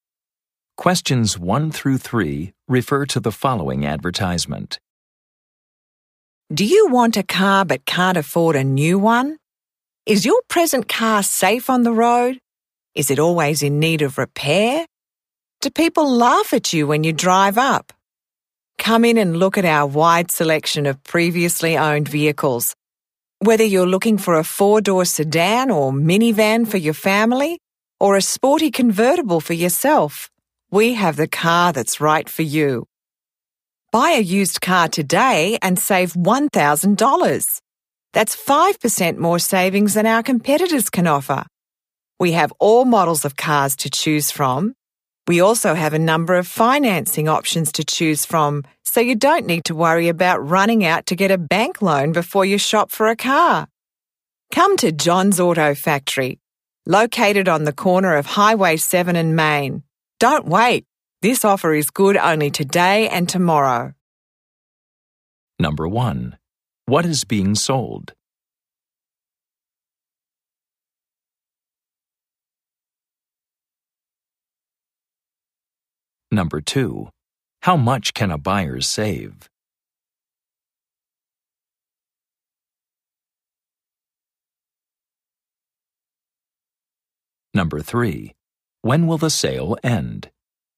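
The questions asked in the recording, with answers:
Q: What is being sold?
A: Used cars

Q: How much can a buyer save?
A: $1,000

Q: When will the sale end?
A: Tomorrow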